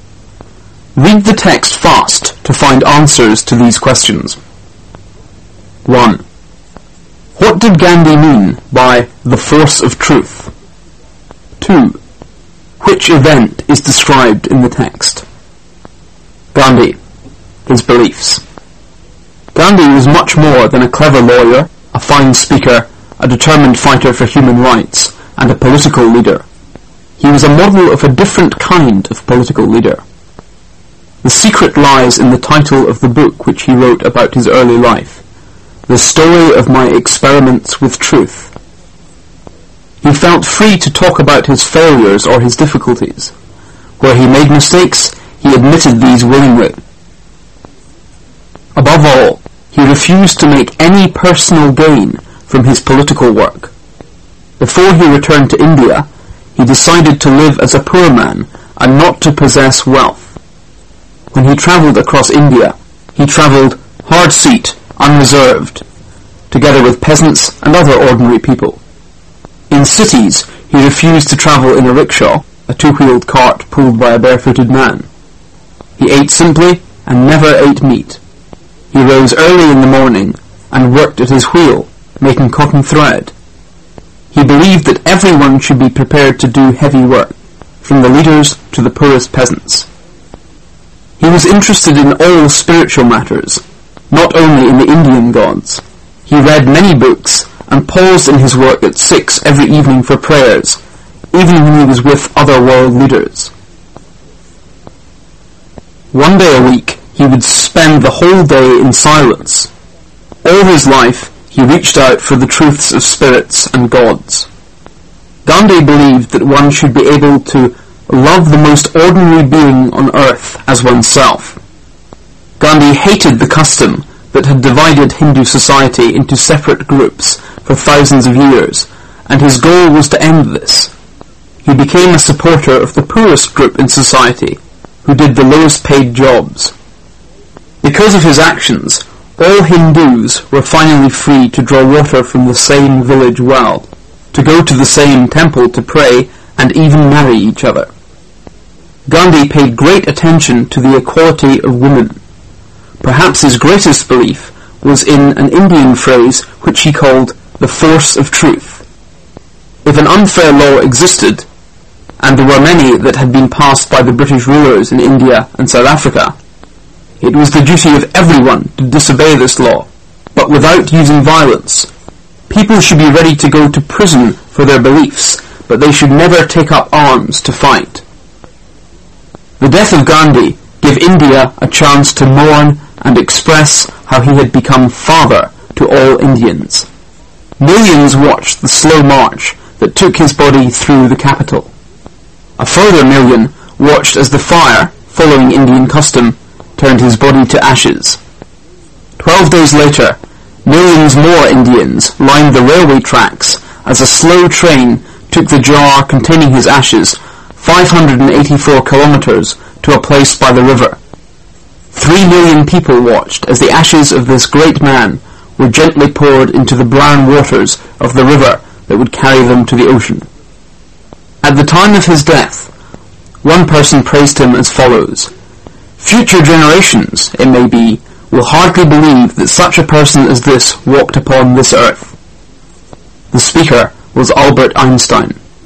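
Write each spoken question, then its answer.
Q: What did Gandhi mean by the force of truth?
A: Disobeying unfair laws without using violence, being ready to go to prison but never taking up arms

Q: Which event is described in the text?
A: Gandhi's death and funeral, when his ashes were poured into the river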